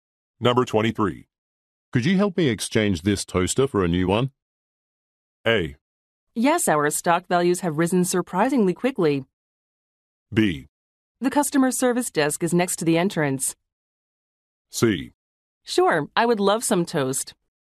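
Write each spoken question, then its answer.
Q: Could you help me exchange this toaster for a new one?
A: B: The customer service desk is next to the entrance.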